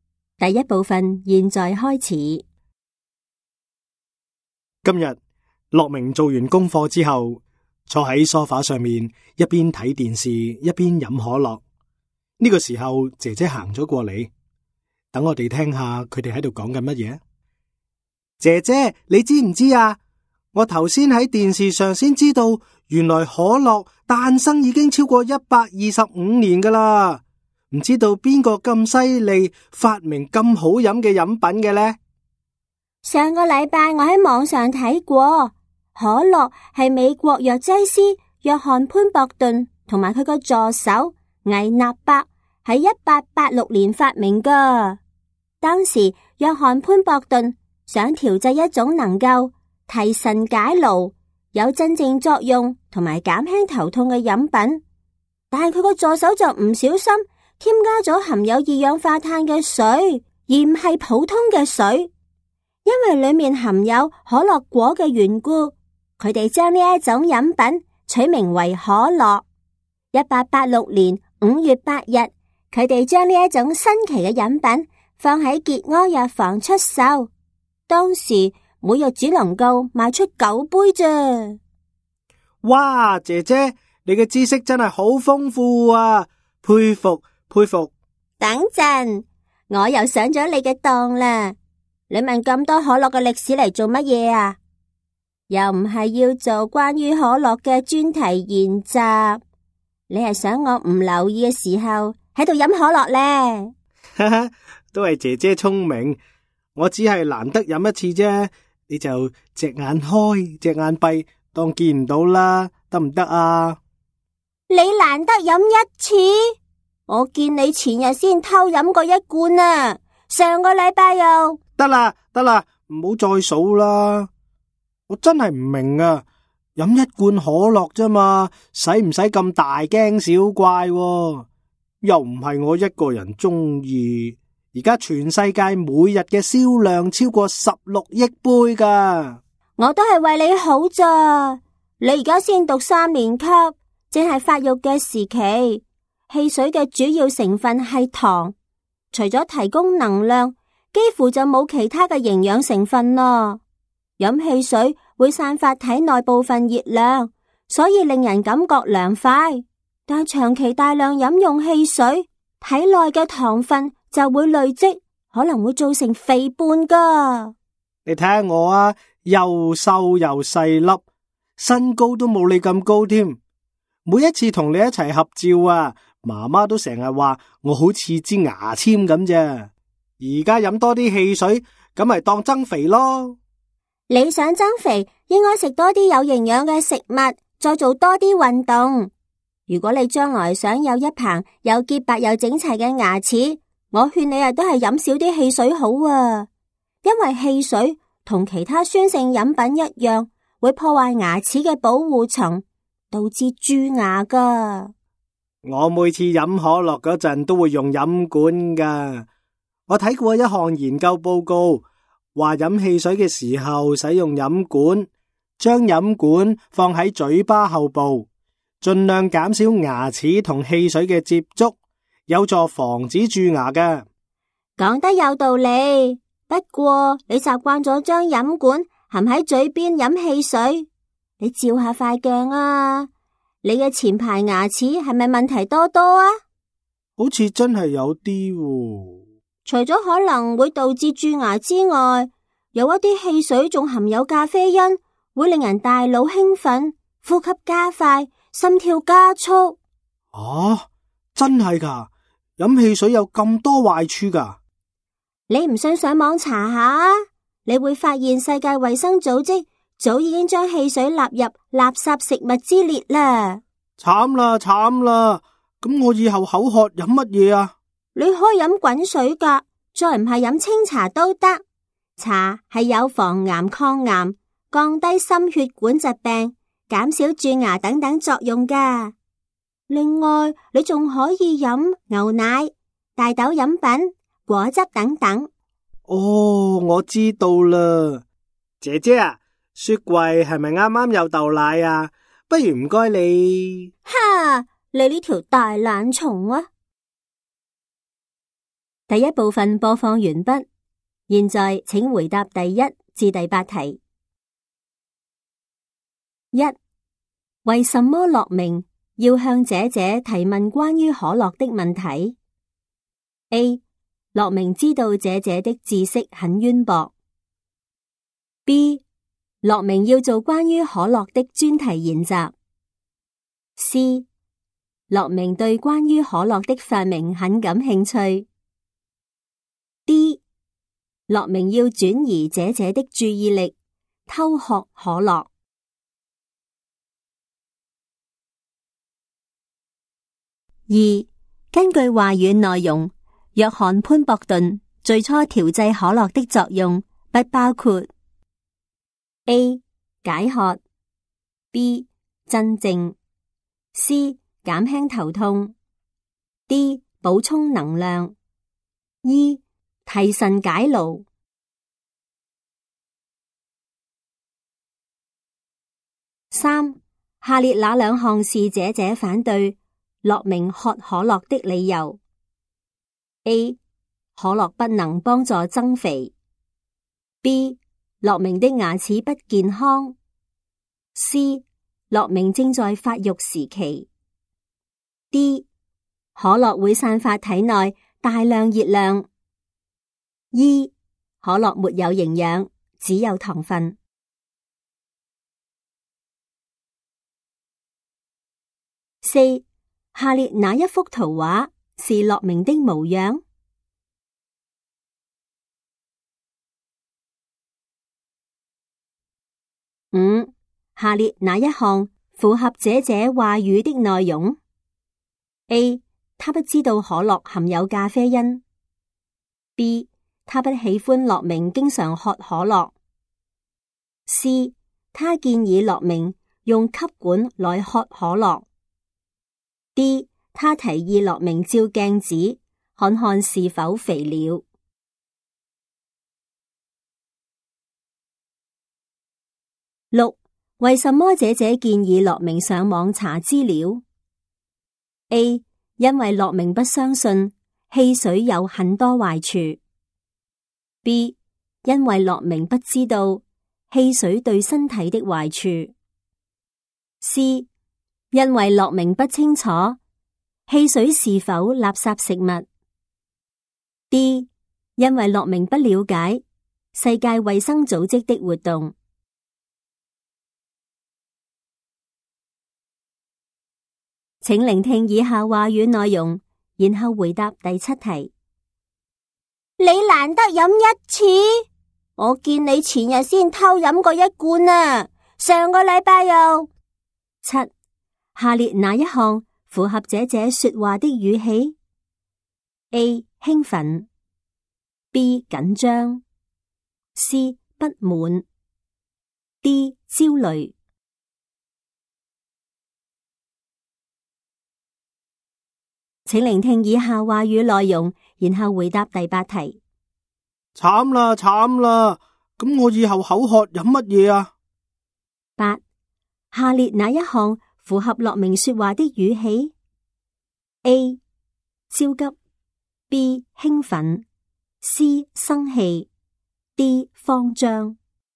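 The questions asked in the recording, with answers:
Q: 为什么乐明要向姐姐提问关于可乐的问题 ?A. 乐明知道姐姐的知识很渊博。 B. 乐明要做关于可乐的专题研习。C. 乐明对关于可乐的发明很感兴趣。 D. 乐明要转移姐姐的注意力,偷学可乐。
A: D: 乐明要转移姐姐的注意力,偷喝可乐

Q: 下列哪一项符合姐姐话语的内容 ?A. 他不知道可乐含有咖啡因。 B. 他不喜欢乐明经常喝可乐。C. 他建议乐明用吸管来喝可乐。 D. 他提议乐明照镜子,看看是否肥了。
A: B: 他不喜欢乐明经常喝可乐

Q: 为什么姐姐建议乐明上网查资料 ?A. 因为乐明不相信汽水有很多坏处。 B. 因为乐明不知道汽水对身体的坏处。C. 因为乐明不清楚汽水是否垃圾食物。 D. 因为乐明不了解世界卫生组织的活动。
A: A: 因为乐明不相信汽水有很多坏处

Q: 下列哪一项符合姐姐说话的语气 ?A. 兴奋 ,B. 紧张 ,C. 不满 ,D. 焦虑。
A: C: 不满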